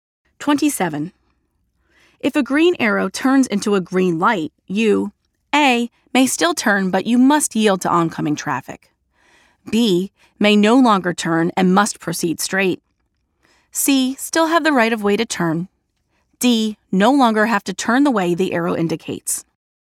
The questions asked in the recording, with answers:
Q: If a green arrow turns into a green light, you,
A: The answer is letter A.